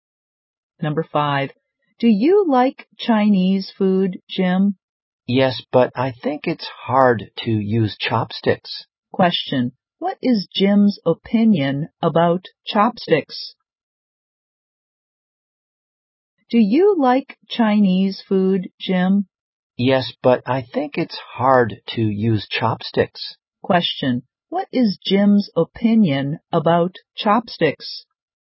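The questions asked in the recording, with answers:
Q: Question,What is Jim's opinion about chopsticks?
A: They are hard to use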